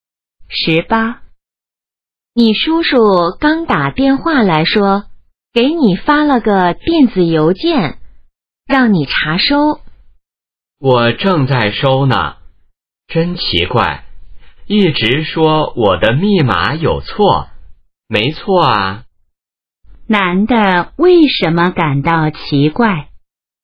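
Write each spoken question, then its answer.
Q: 男的为什么感到奇怪?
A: 一直说他的密码有错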